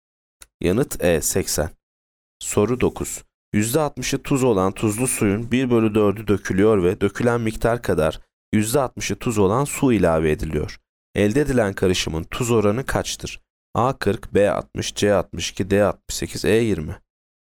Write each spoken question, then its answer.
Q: Elde edilen karışımın tuz oranı kaçtır?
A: Yanıt B 60.